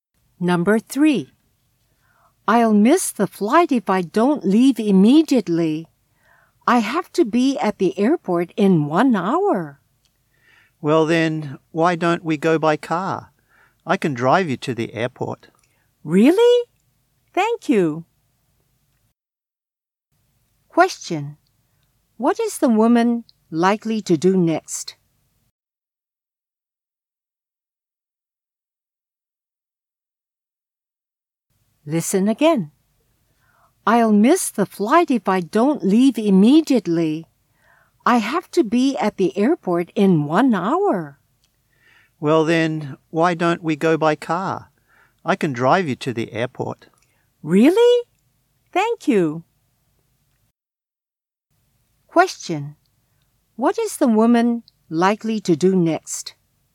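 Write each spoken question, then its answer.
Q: What is the woman likely to do next?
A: Go to the airport in the man's car.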